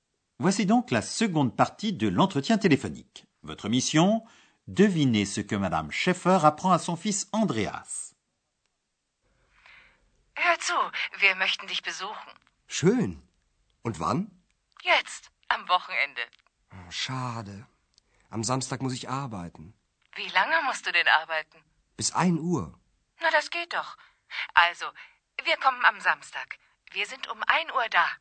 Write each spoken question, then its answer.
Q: Devinez ce que Madame Schäffer apprend à son fils Andreas.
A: La mère d'Andreas lui dit qu'ils viendront le samedi à une heure à l'hôtel Europa d'Aix-la-Chapelle.